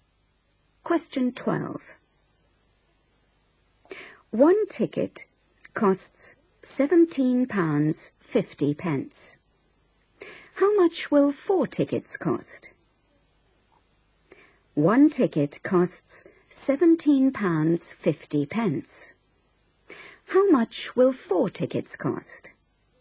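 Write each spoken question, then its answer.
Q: How much will four tickets cost?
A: £70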